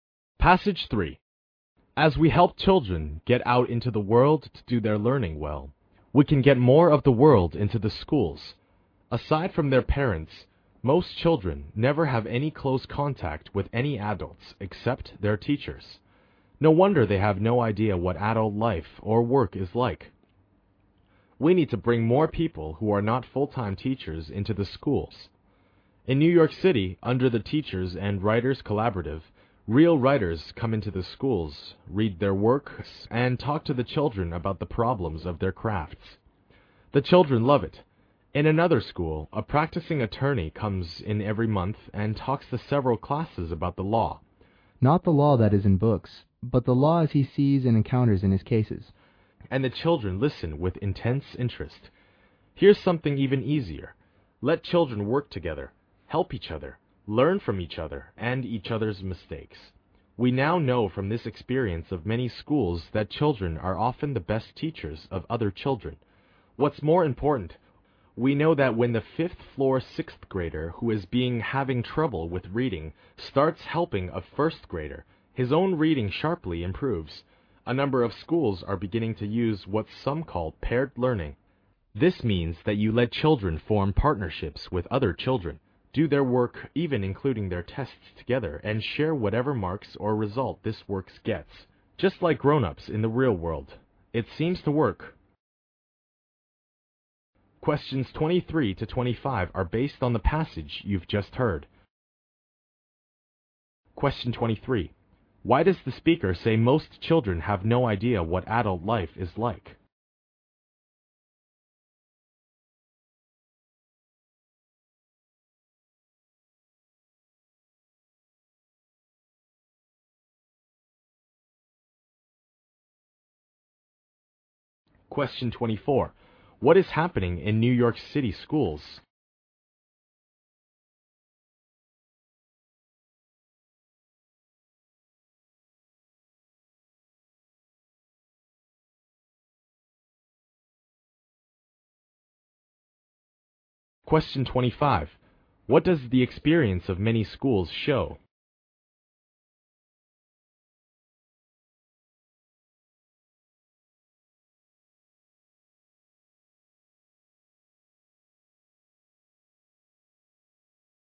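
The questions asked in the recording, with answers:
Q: Why does the speaker say most children have no idea what adult life is like?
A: Apart from their parents, they have no close contact with any adults except their teachers.

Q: What is happening in New York City schools?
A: Real writers come in to read their works and talk to the children about their craft.

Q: What does the experience of many schools show?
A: Children are often the best teachers of other children.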